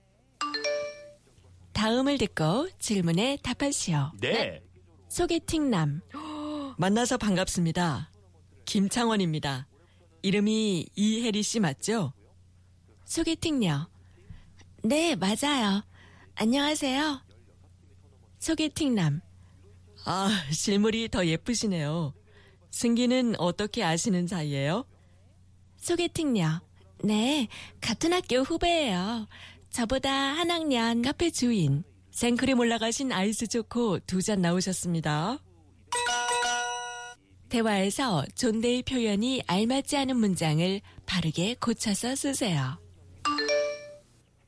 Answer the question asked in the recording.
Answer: 생크림 올린 아이스 초코 두 잔 나왔습니다.